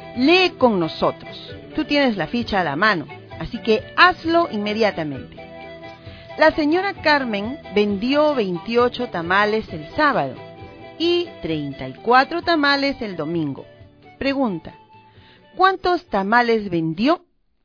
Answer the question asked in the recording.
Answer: 62 tamales vendidos por la señora Carmen.